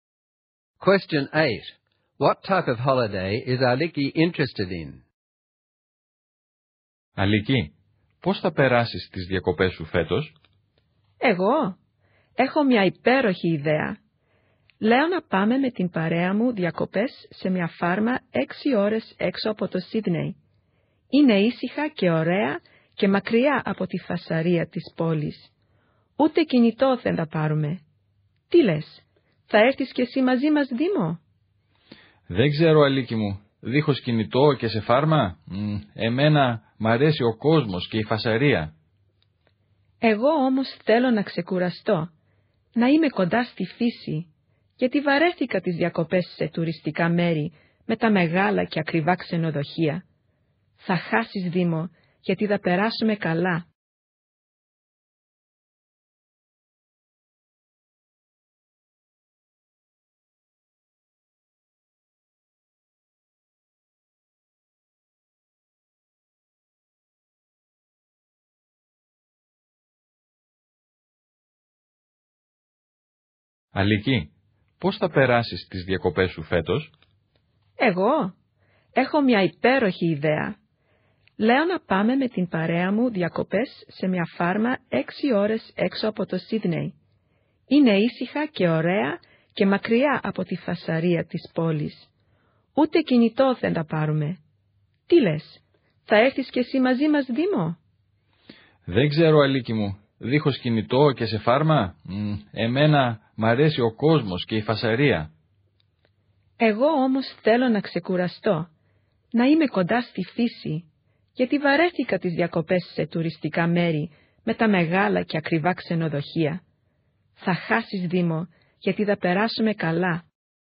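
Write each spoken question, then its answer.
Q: What type of holiday is Aliki interested in?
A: A quiet, restful holiday on a farm close to nature, away from the city, with no mobile phones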